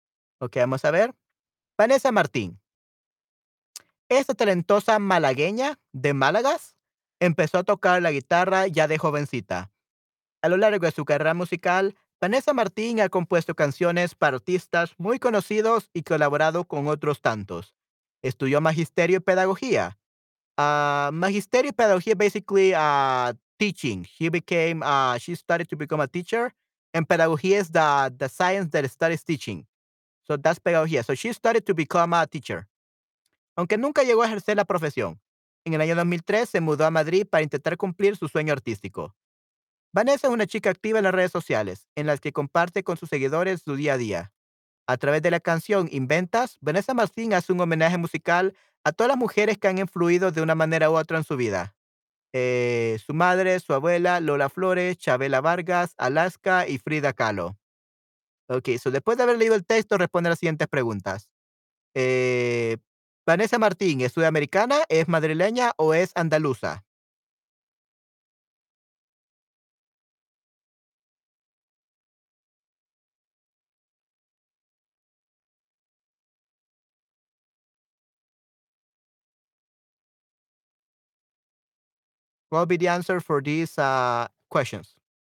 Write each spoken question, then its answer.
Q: Eh, Vanessa Martín, ¿es sudamericana, es madrileña o es andaluza?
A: Andaluza, correcto.